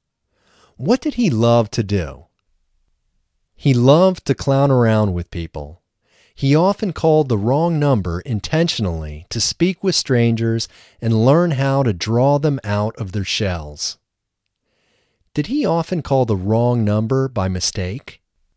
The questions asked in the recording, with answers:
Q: Did he often call the wrong number by mistake?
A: No, he did not often call the wrong number by mistake.